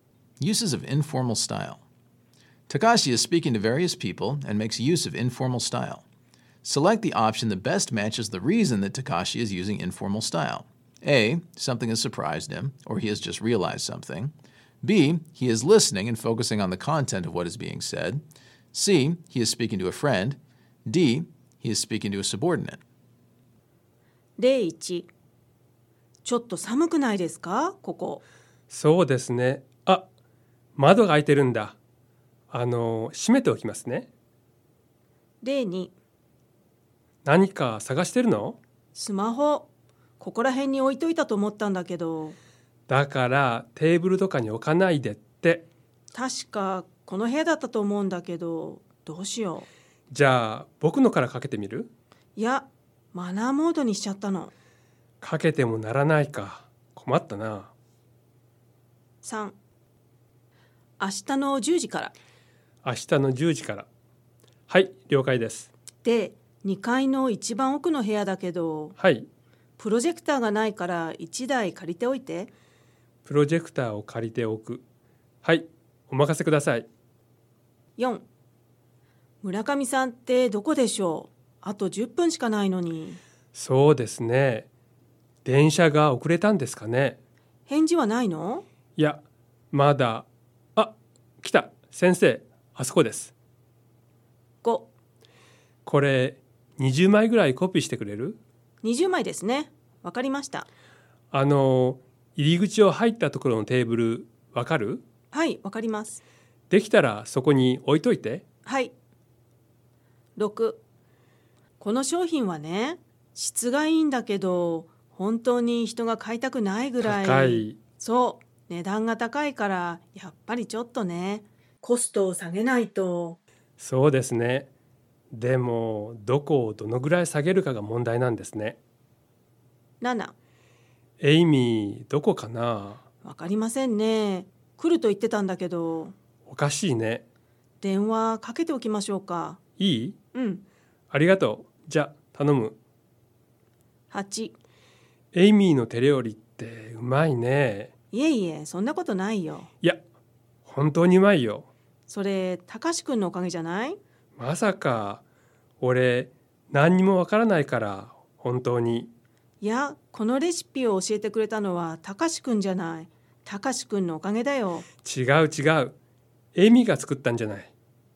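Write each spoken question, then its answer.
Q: Select the option that best matches the reason that Takashi is using informal style.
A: C: He is speaking to a friend.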